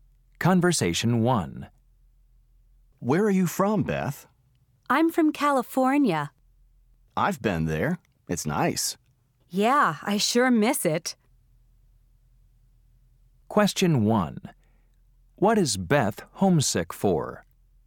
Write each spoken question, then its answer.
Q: What is Beth homesick for?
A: It sounds like you're homesick for California.